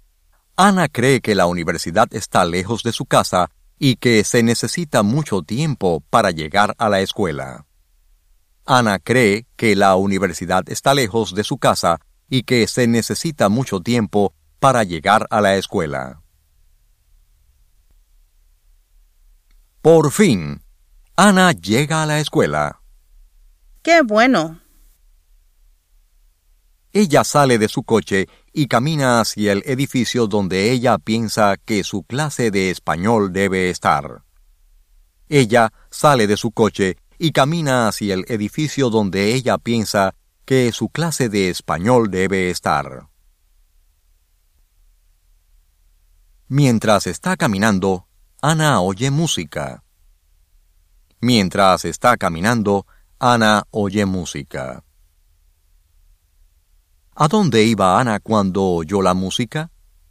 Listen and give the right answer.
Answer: Ana caminaba hacia el edificio donde ella pensaba que su clase de español debía estar.